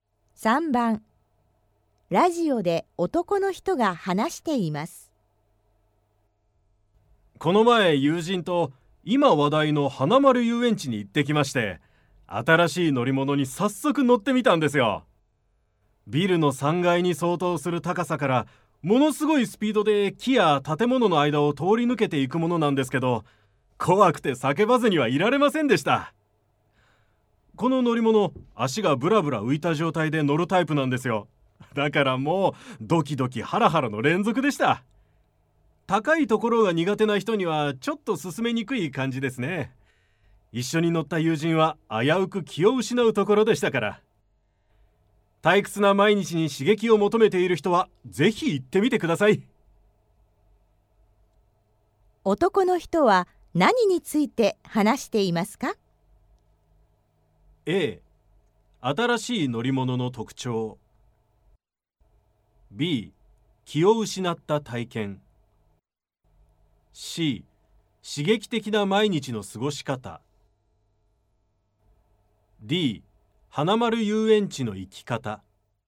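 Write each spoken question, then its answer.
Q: 男の人は何について話していますか?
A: A: 新しい乗り物の特徴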